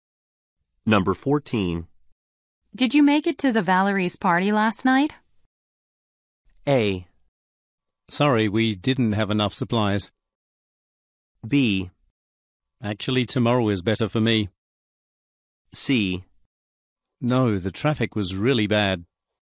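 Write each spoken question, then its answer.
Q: Did you make it to the Valerie's party last night?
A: C: No, the traffic was really bad.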